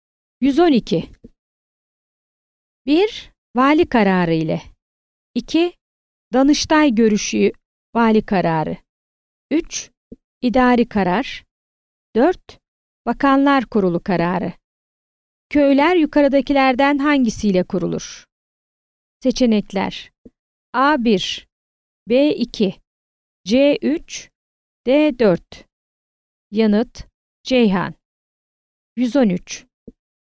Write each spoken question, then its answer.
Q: Köyler yukarıdakilerden hangisiyle kurulur?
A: Yanıt: Ceyhan.